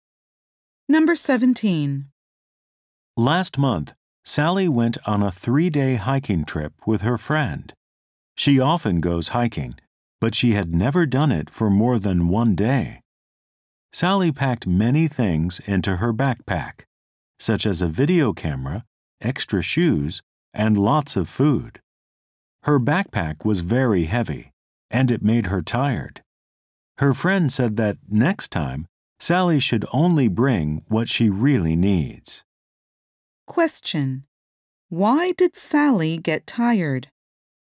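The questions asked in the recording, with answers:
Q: Why did Sally get tired?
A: Her backpack was too heavy.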